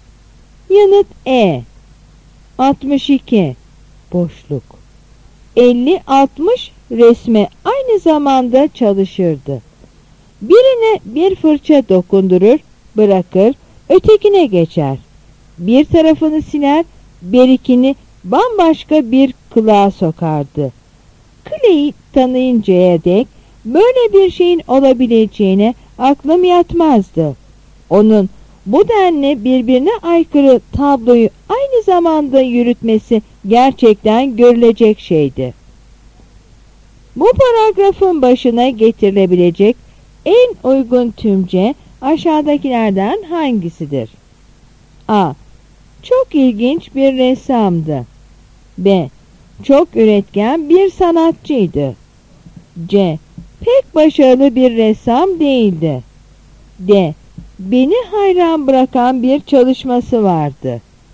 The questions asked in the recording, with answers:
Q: Bu paragrafın başına getirilebilecek en uygun tümce aşağıdakilerden hangisidir?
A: Yanıt A.